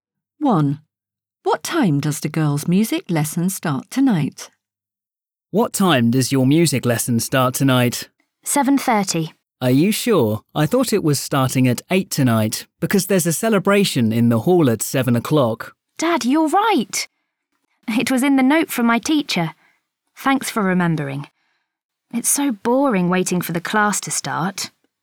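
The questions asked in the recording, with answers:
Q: What time does the girls' music lesson start tonight?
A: 8 o'clock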